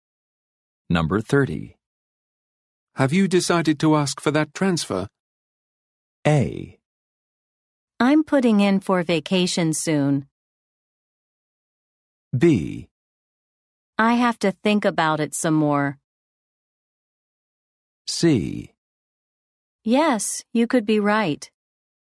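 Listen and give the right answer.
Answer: B: I have to think about it some more.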